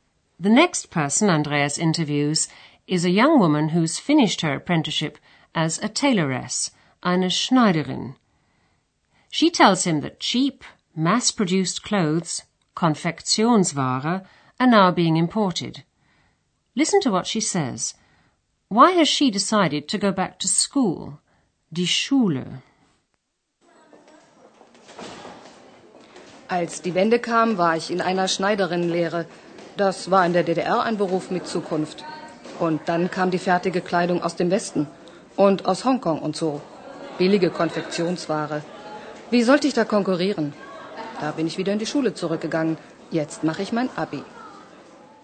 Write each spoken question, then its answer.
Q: Listen to what she says – why has she decided to go back to school?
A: She reckoned that in her job she couldn't compete with cheap, mass produced clothes.